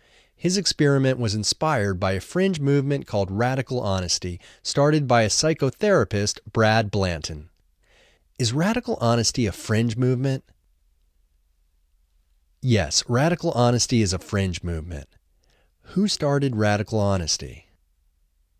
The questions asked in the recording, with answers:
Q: Who started Radical Honesty?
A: Radical Honesty was started by psychotherapist Brad Blanton.